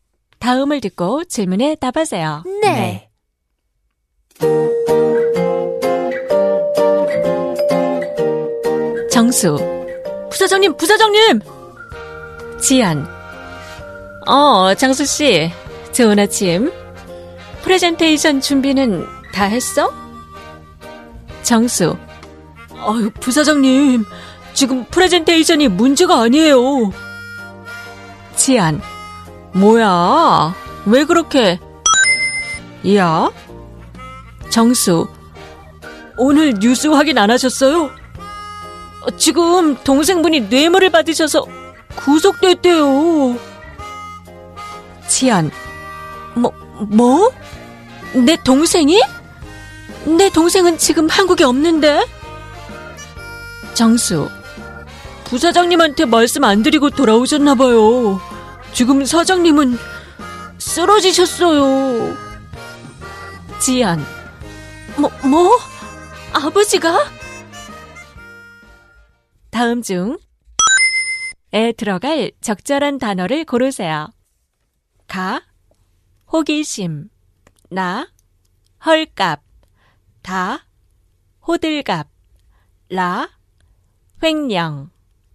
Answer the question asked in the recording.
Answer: So that's the answer. 뭐야 왜 이렇게 호들갑이야?